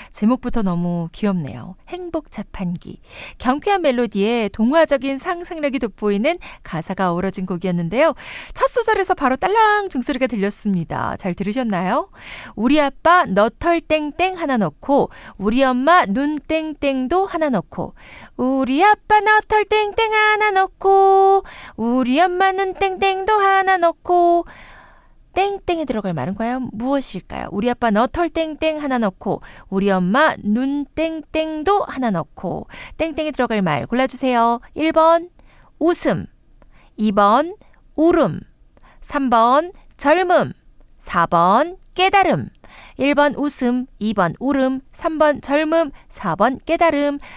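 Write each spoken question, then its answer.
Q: 우리 아빠 너털 땡땡 하나 넣고 우리 엄마 눈 땡땡도 하나 넣고 땡땡에 들어갈 말 골라주세요.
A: 1: 웃음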